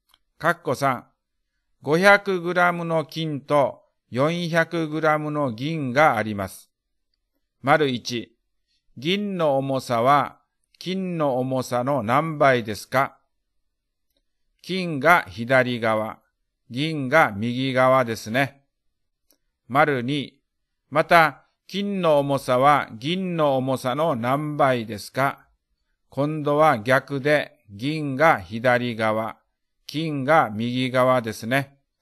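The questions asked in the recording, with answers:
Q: 銀の重さは金の重さの何倍ですか?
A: 0.8倍

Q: また金の重さは銀の重さの何倍ですか?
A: 1.25倍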